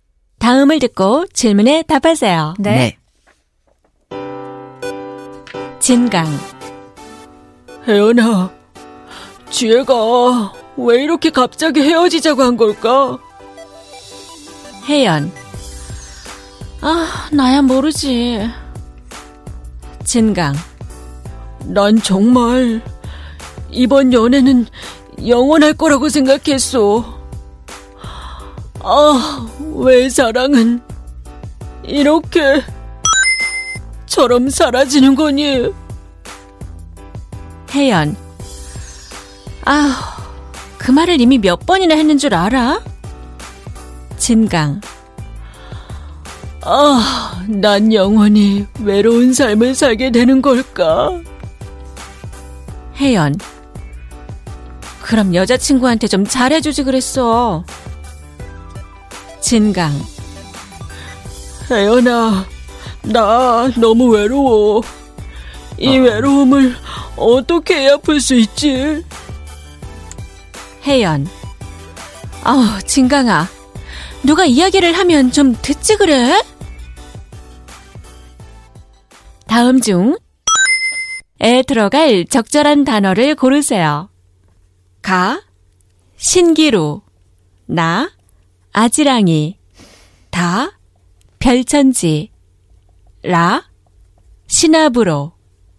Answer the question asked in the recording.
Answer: Or is it 신기루? 신기루, like a mirage.